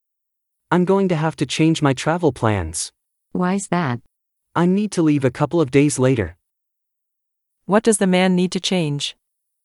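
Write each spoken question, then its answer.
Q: What does the man need to change?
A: His travel plans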